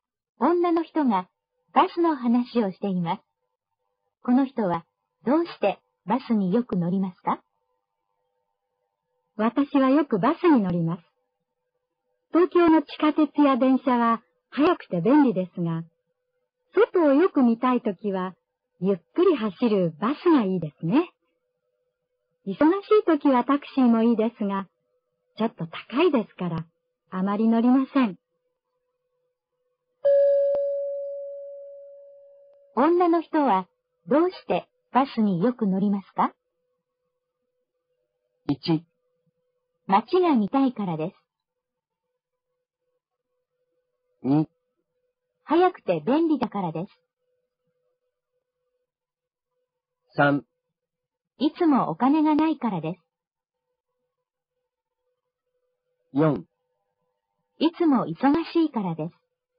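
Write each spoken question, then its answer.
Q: 女の人はどうしてバスによく乗りますか?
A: 1: 街が見たいからです。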